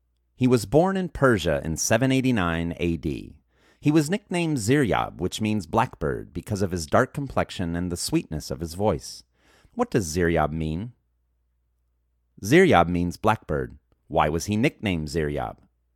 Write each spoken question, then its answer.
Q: Why was he nicknamed Ziryab?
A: He was nicknamed Ziryab because of his dark complexion and the sweetness of his voice.